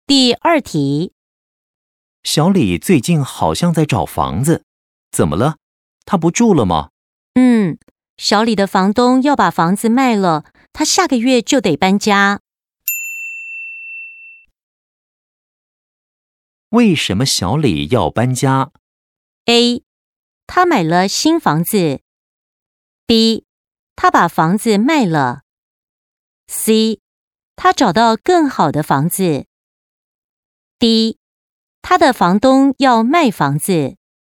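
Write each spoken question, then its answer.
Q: 为什么小李要搬家?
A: D: 他的房东要卖房子。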